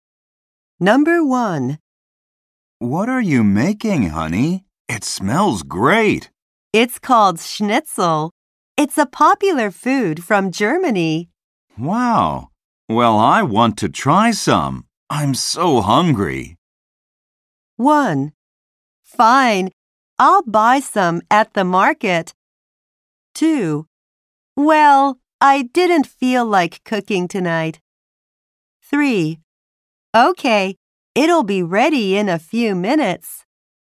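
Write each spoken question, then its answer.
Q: I'm so hungry.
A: 3: Okay, it'll be ready in a few minutes.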